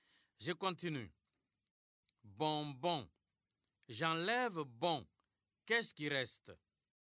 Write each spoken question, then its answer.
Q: Bonbon. J'enlève bon. Qu'est-ce qui reste?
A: Monsieur, il reste bon.